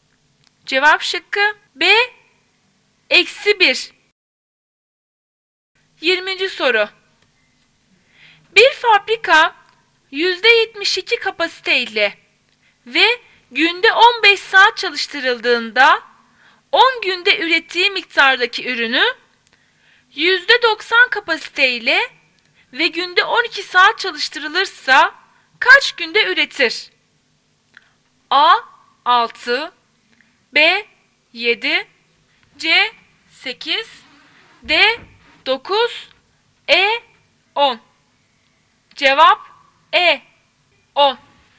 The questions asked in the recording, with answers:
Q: Bir fabrika %72 kapasiteyle ve günde 15 saat çalıştırıldığında 10 günde ürettiği miktardaki ürünü %90 kapasiteyle ve günde 12 saat çalıştırılırsa kaç günde üretir?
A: Cevap E 10.